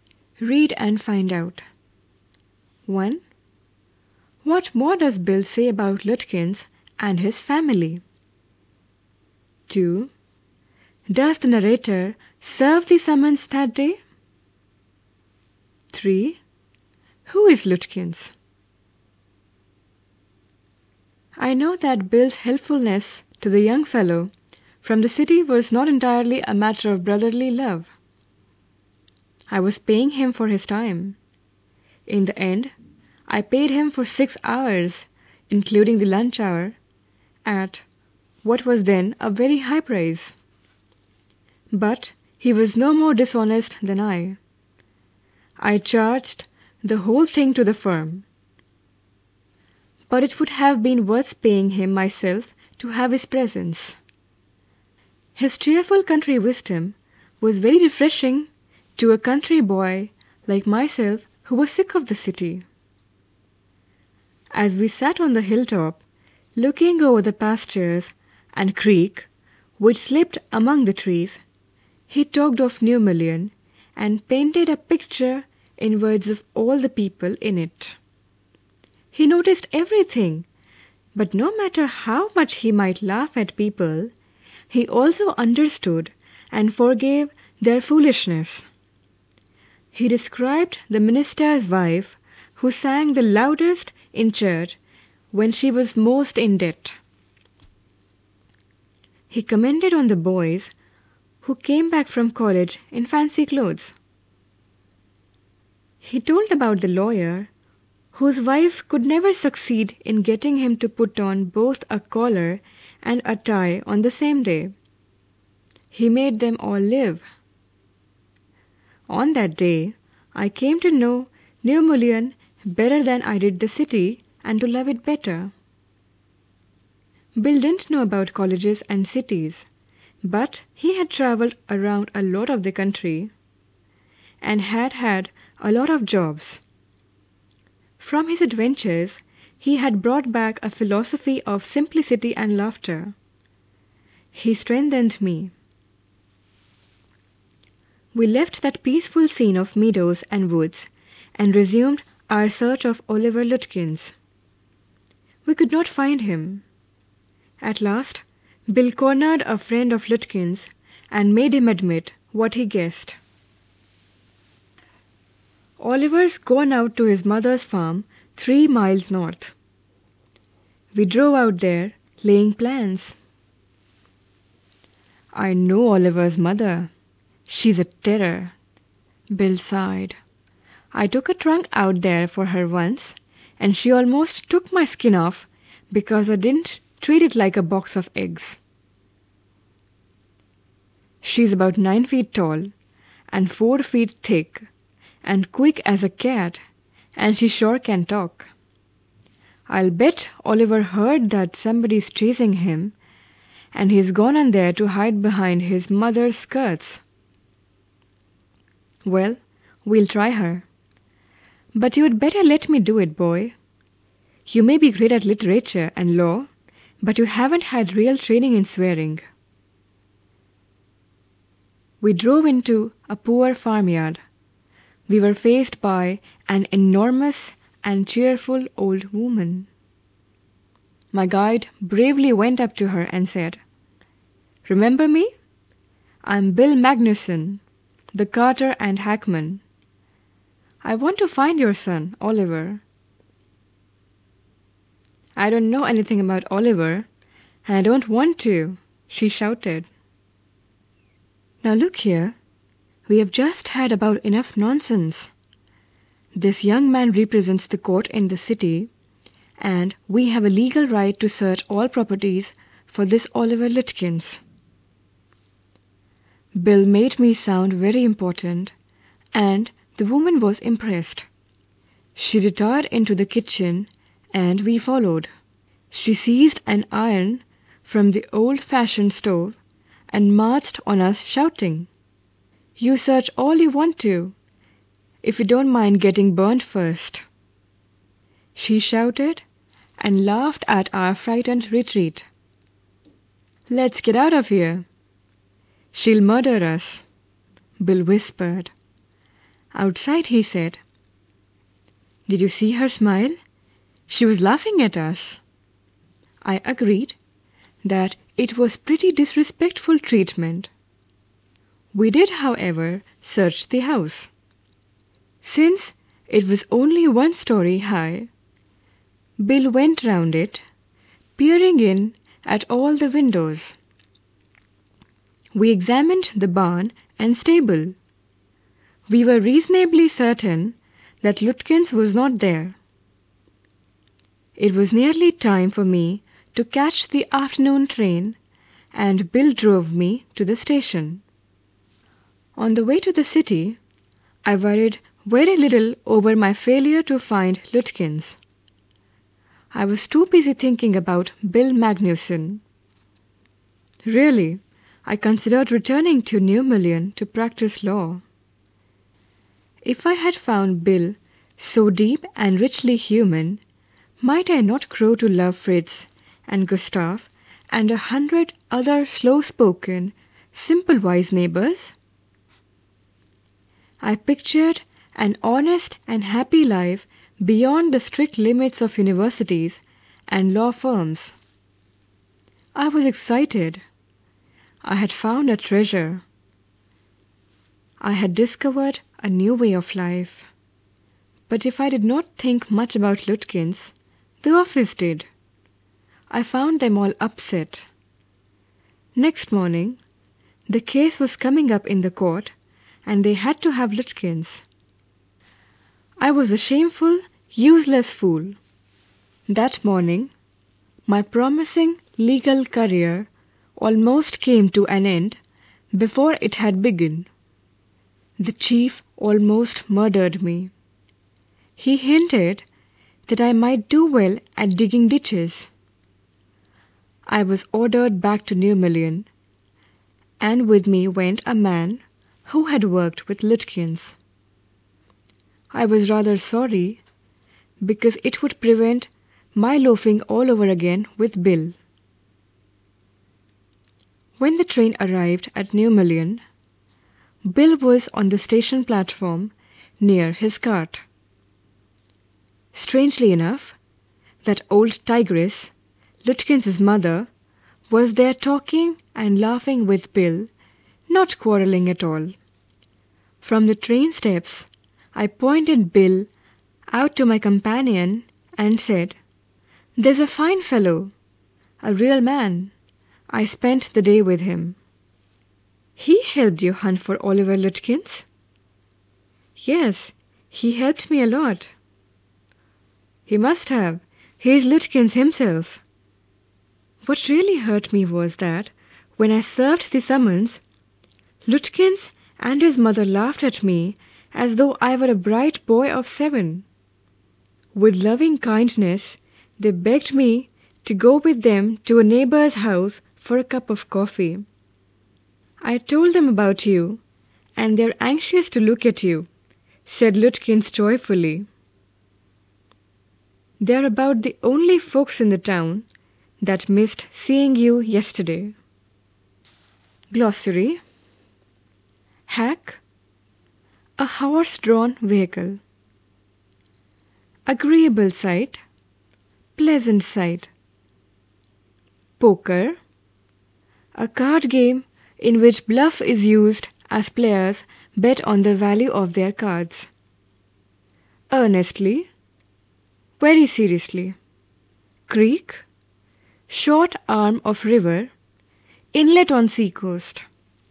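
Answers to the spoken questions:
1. Lutkins has gone to hide at his mother's farm; his mother is a huge, fierce terror
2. No
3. The hack driver, Bill, himself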